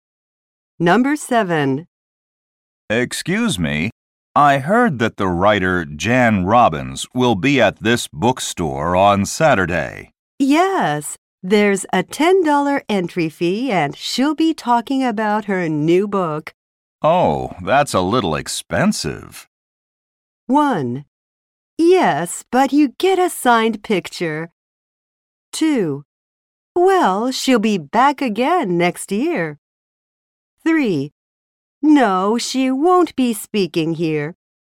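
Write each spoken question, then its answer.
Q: Oh, that's a little expensive.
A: 1: Yes, but you get a signed picture.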